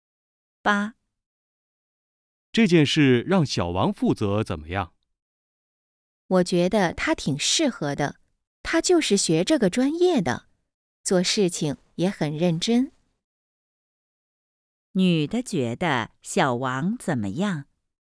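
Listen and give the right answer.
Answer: 很适合,做事认真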